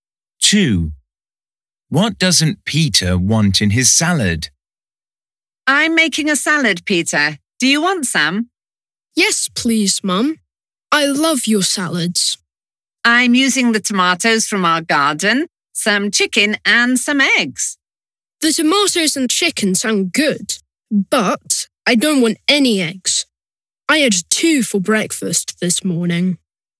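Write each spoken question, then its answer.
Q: What doesn't Peter want in his salad?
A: eggs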